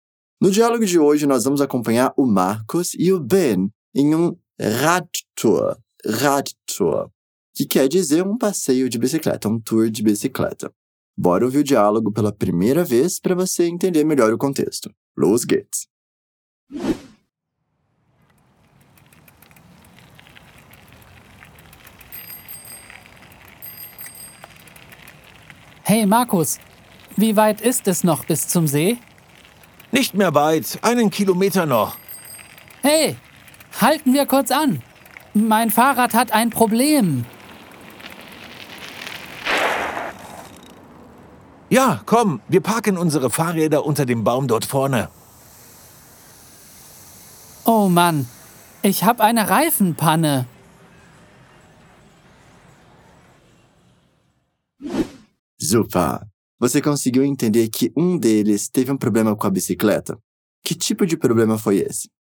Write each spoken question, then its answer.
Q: Que tipo de problema foi esse?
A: Oh Mann, ich habe eine Reifenpanne. Ah, não. Furou o pneu da bicicleta.